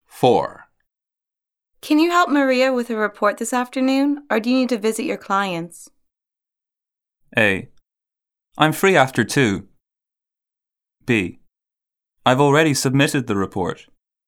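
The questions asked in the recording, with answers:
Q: Can you help Maria with a report this afternoon, or do you need to visit your clients?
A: A: I'm free after 2.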